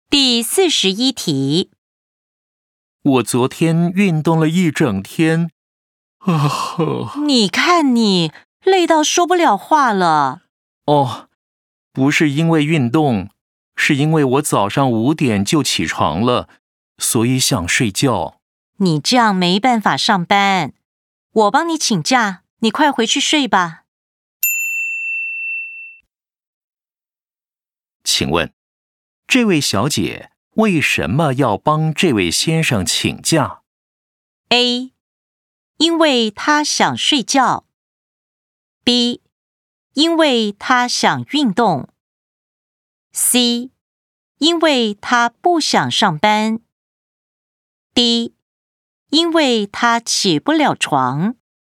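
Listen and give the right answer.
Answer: A: 因为她想睡觉。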